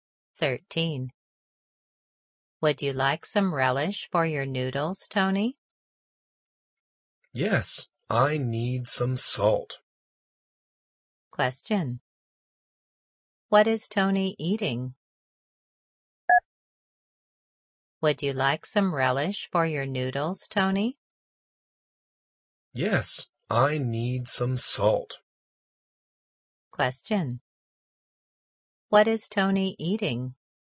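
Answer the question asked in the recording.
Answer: Noodles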